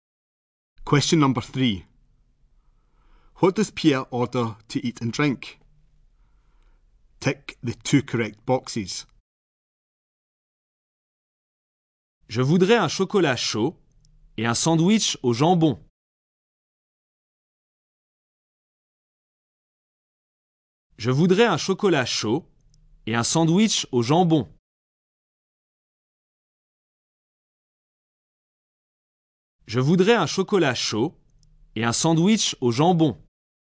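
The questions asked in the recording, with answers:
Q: What does Pierre order to eat and drink?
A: A hot chocolate and a ham sandwich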